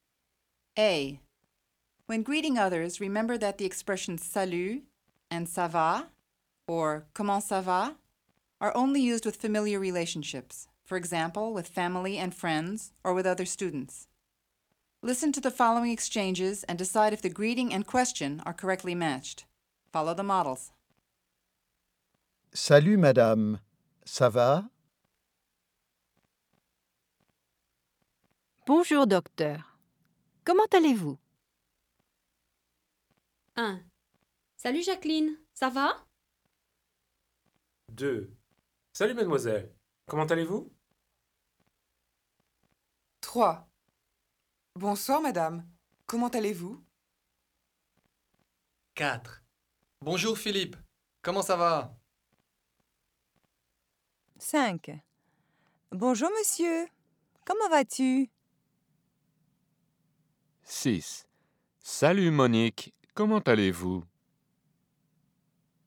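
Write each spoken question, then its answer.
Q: Salut, Jacqueline. Ça va?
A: correct

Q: Salut, mademoiselle. Comment allez-vous?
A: incorrect

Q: Bonsoir, madame. Comment allez-vous?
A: correct

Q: Bonjour, Philippe. Comment ça va?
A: correct

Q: Bonjour, monsieur. Comment vas-tu?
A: incorrect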